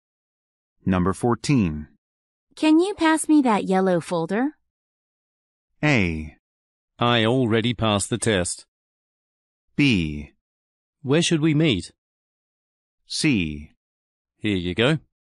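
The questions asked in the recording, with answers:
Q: Can you pass me that yellow folder?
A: C: Here you go.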